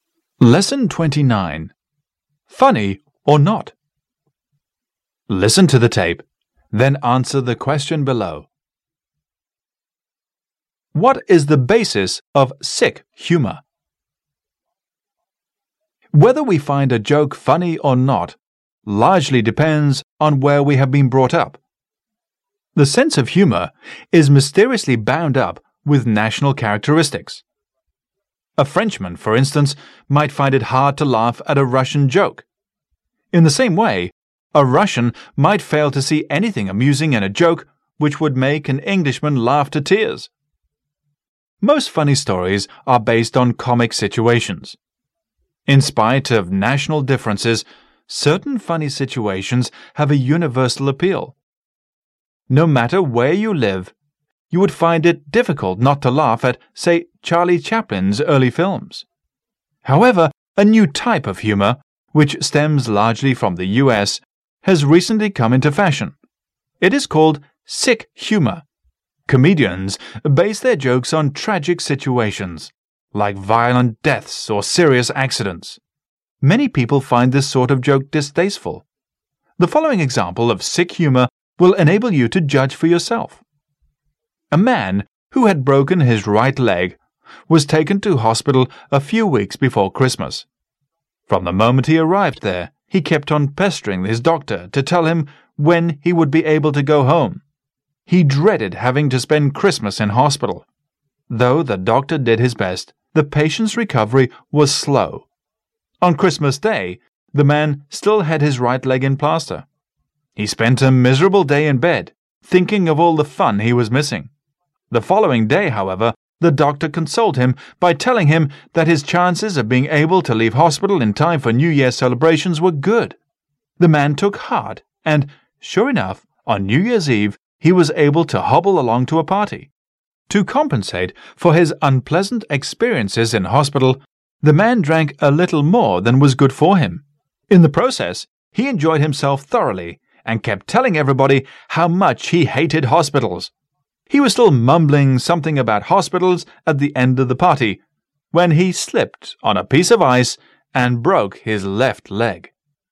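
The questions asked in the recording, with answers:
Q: What is the basis of sick humor?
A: Tragic situations, like violent deaths or serious accidents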